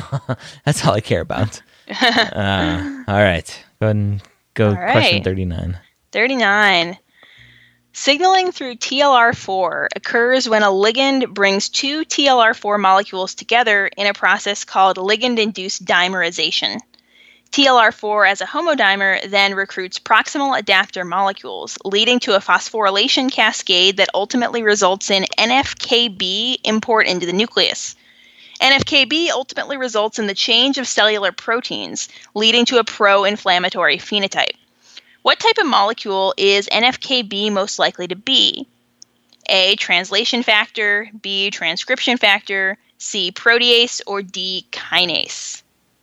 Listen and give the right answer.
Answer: So B, transcription factor, is the right answer here.